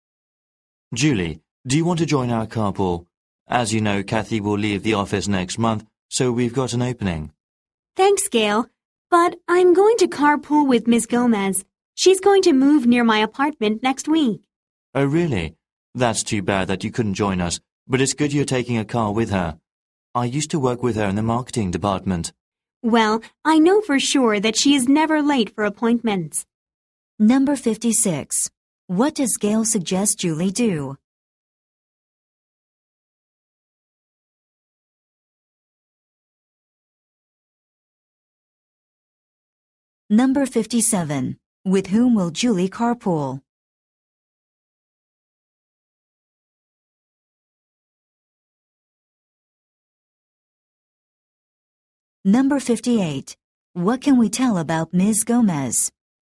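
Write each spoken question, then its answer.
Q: What does Gail suggest Julie do?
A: Join her carpool

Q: With whom will Julie carpool?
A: Ms. Gomez

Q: What can we tell about Ms. Gomez?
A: She is never late for appointments (she is punctual)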